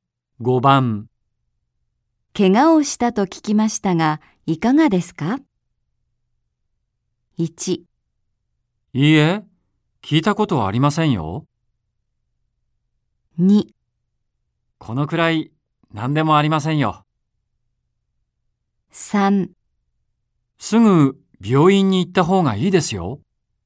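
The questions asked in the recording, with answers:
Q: 怪我をしたと聞きましたがいかがですか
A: 2: このくらい何でもありませんよ。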